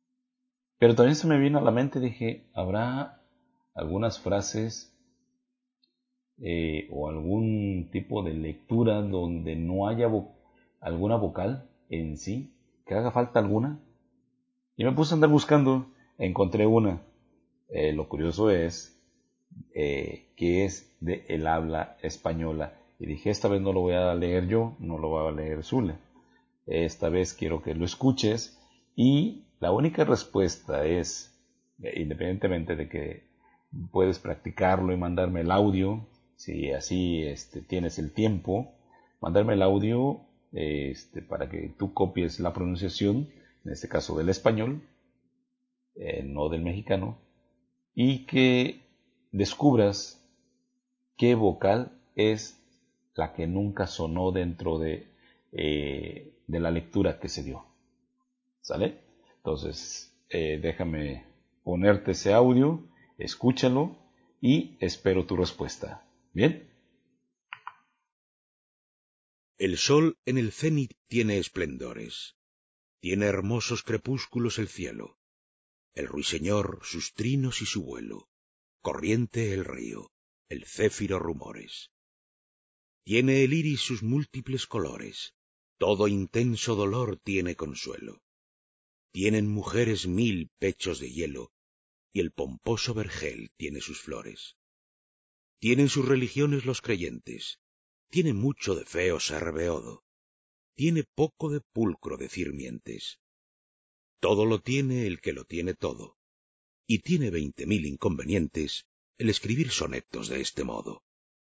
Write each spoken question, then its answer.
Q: que descubras qué vocal es la que nunca sonó dentro de la lectura que se dio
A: Efectivamente, es la letra A, la que nunca sonó en todo el texto.